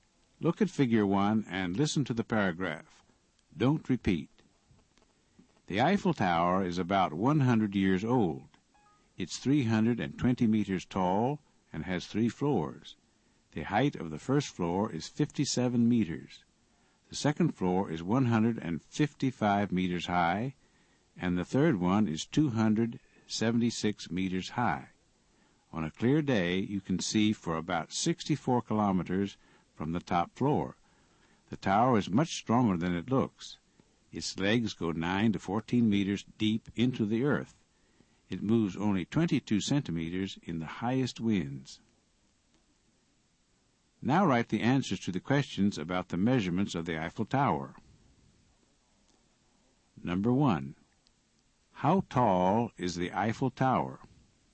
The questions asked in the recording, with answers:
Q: How tall is the Eiffel Tower?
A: It's 320 meters tall.